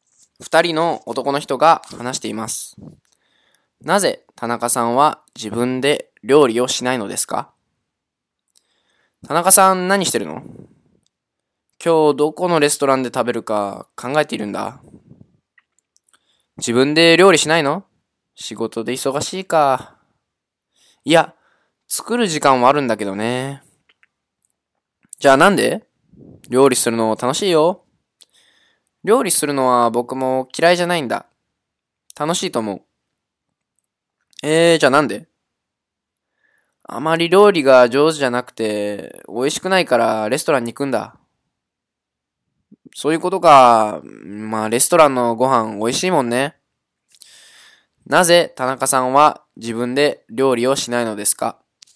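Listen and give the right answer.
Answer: 料理があまり上手じゃなくて、美味しくないから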